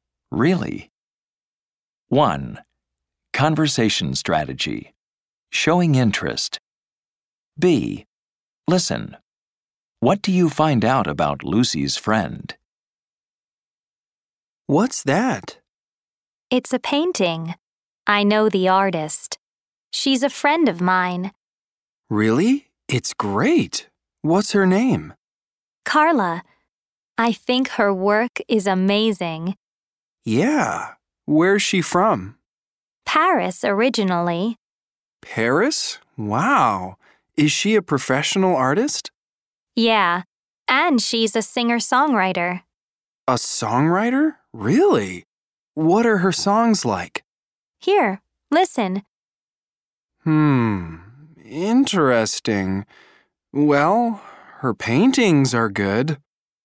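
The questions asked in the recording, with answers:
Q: What do you find out about Lucy's friend?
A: Her name is Carla. She's from Paris, and she's a professional artist and a singer-songwriter.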